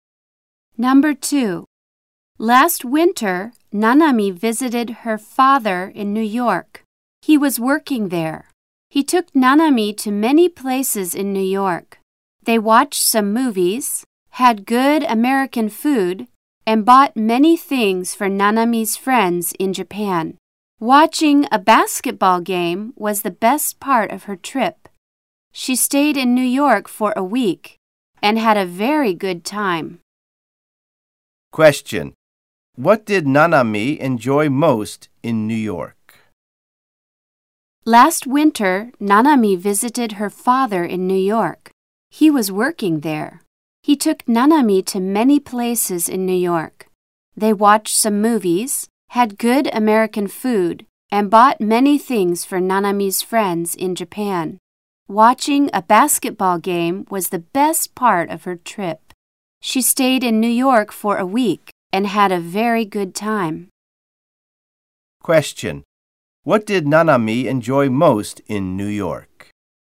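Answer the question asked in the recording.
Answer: Watching a basketball game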